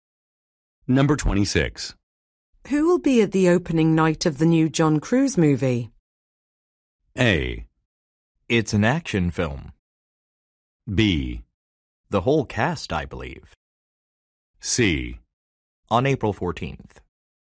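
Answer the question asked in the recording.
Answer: B: The whole cast, I believe.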